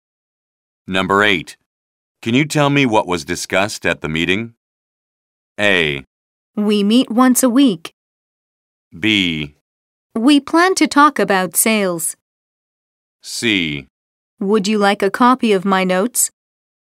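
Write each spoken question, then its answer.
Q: Can you tell me what was discussed at the meeting?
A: C: Would you like a copy of my notes?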